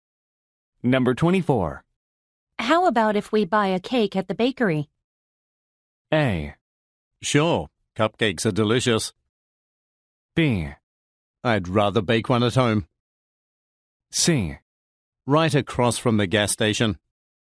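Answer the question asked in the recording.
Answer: B: I'd rather bake one at home.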